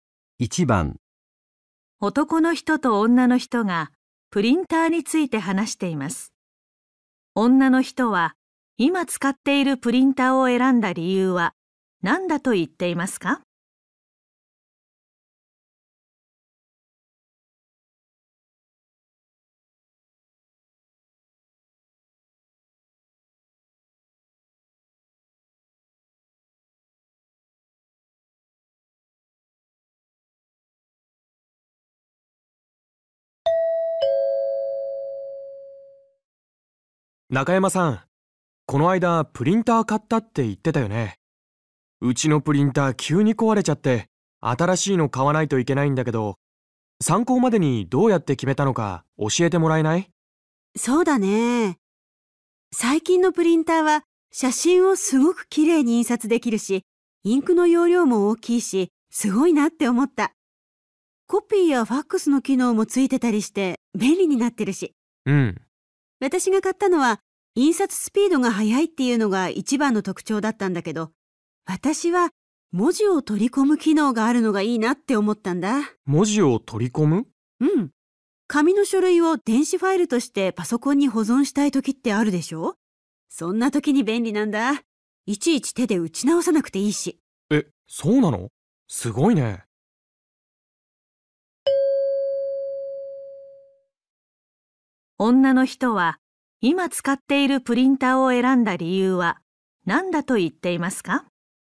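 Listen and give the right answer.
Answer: 文字を取り込む機能があるから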